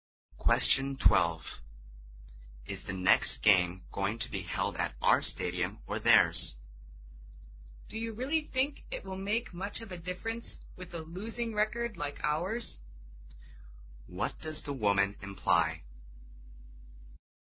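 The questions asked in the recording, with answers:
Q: What does the woman imply?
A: It doesn't matter where they play; their team will probably lose anyway.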